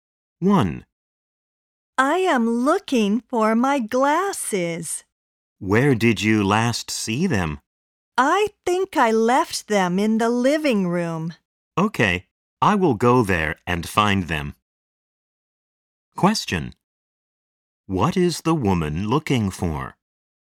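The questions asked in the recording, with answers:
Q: What is the woman looking for?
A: Her glasses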